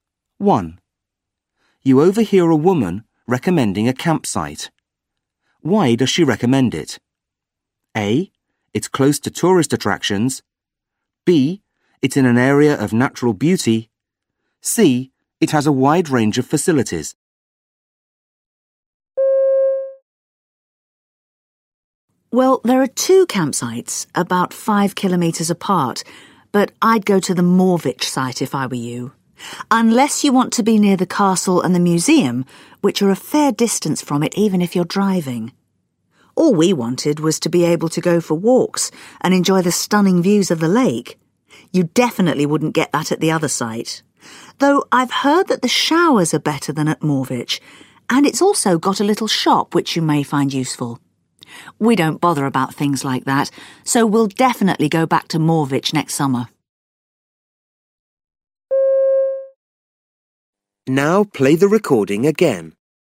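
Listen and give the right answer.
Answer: B: It's in an area of natural beauty.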